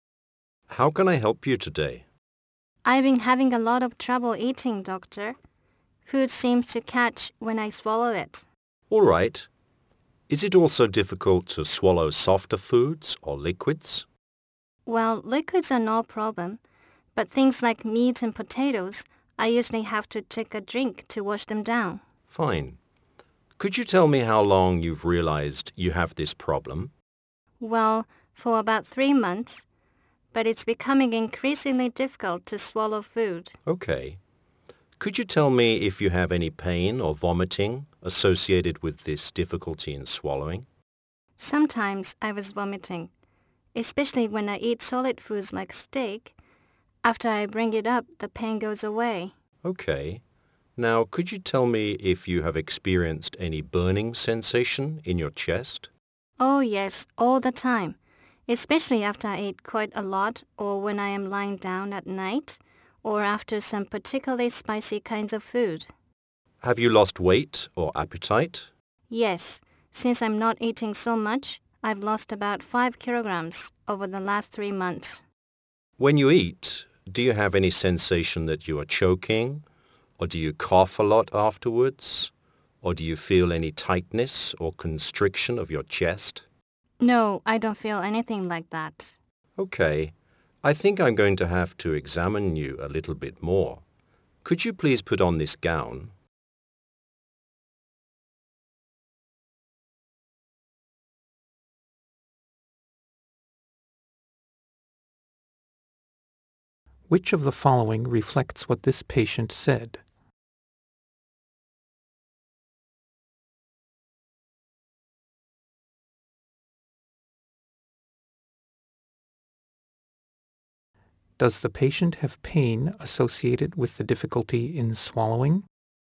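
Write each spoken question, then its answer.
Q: Does the patient have pain associated with the difficulty in swallowing?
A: Yes, sometimes, when vomiting after eating solid foods like steak; the pain goes away after bringing it up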